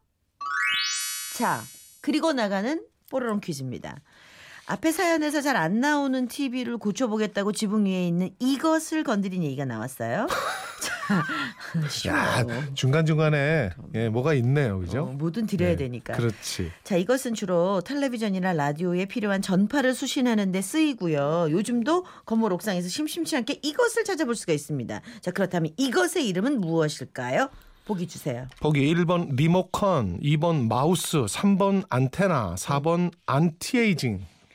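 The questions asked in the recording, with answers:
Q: 자, 그렇다면 이것의 이름은 무엇일까요?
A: 3번: 안테나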